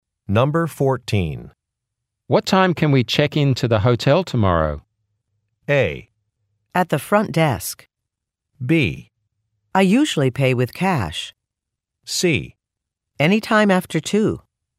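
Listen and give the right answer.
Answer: C: Anytime after 2.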